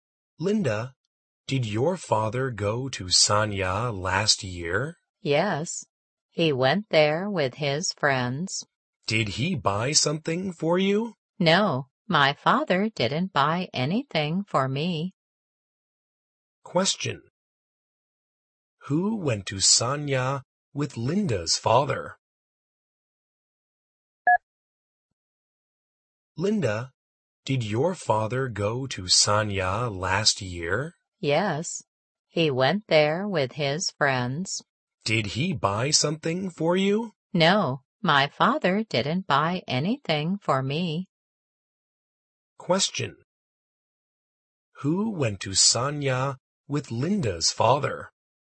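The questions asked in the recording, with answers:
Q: Who went to Sanya with Linda's father?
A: His friends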